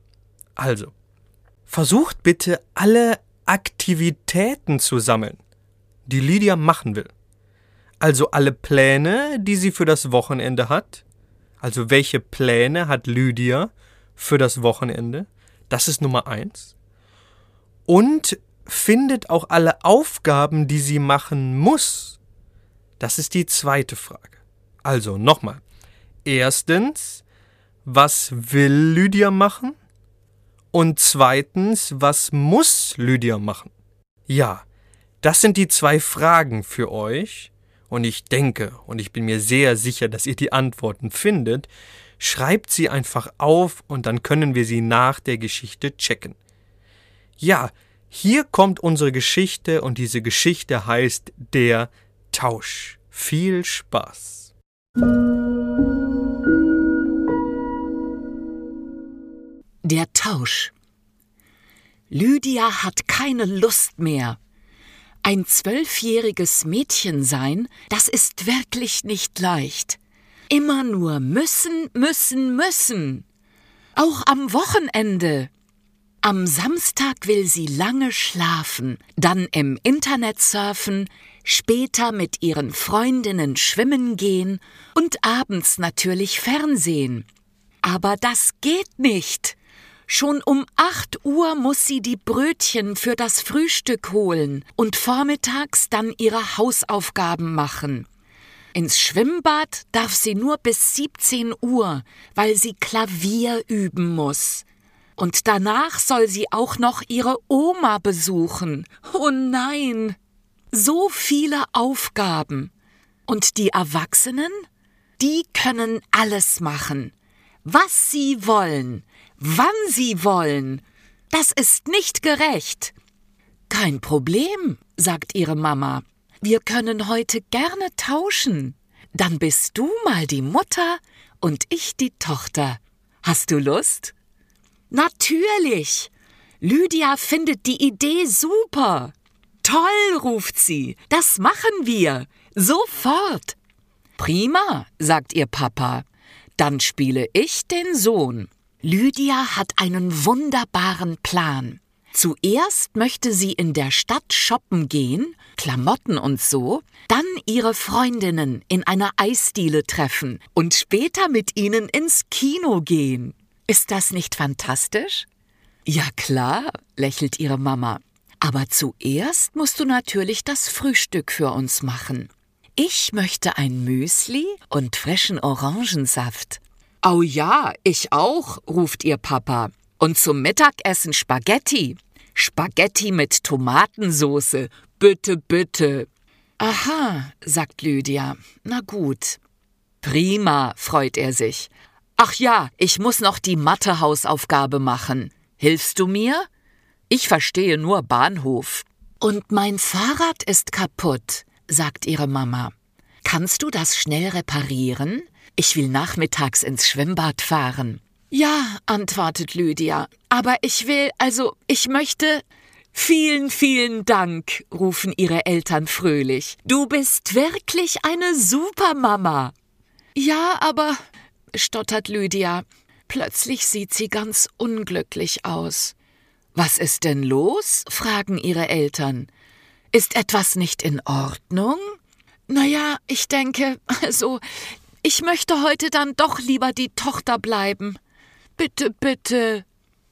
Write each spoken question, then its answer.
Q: Erstens, was will Lydia machen?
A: Lydia will am Wochenende erstens lange schlafen, zweitens im Internet surfen, drittens mit Freundinnen schwimmen gehen und viertens abends Fernsehen.

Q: Und zweitens, was muss Lydia machen?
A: Denn sie muss erstens um 8 Uhr Brötchen holen, zweitens Hausaufgaben machen, drittens Klavier üben, ja, und viertens ihre Oma besuchen.